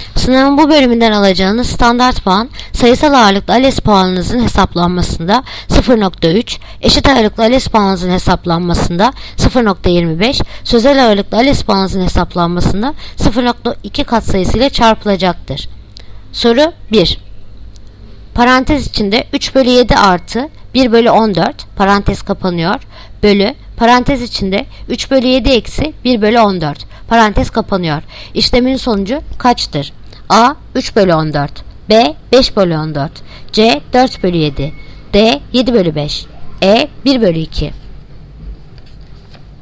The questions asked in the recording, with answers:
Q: İşlemin sonucu kaçtır?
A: Yanıt Diyarbakır 7/5.